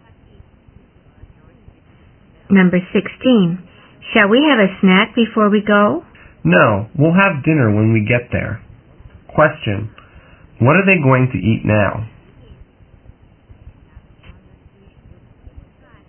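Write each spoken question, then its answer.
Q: What are they going to eat now?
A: Nothing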